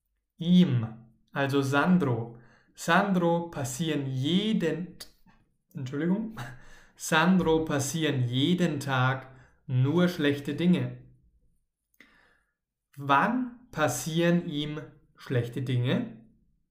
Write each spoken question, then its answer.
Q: Wann passieren ihm schlechte Dinge.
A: Jeden Tag, jeden Tag passieren ihm schlechte Dinge.